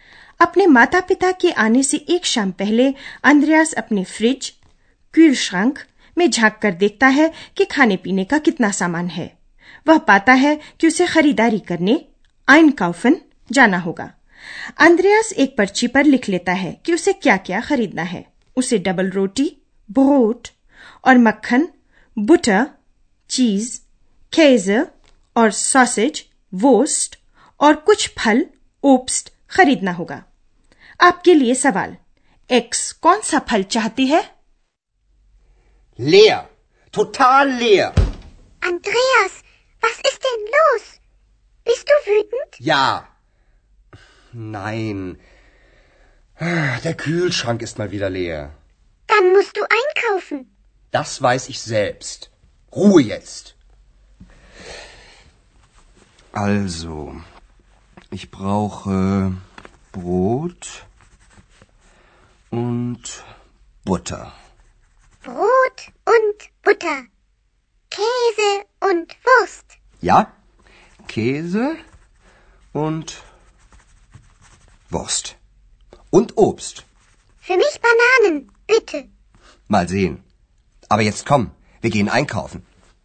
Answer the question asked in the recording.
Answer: तो x केले चाहती है